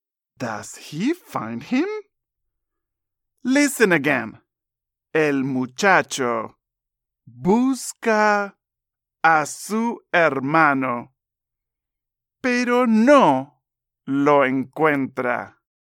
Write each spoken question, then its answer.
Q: Does he find him?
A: No, pobre muchacho. He doesn't find him.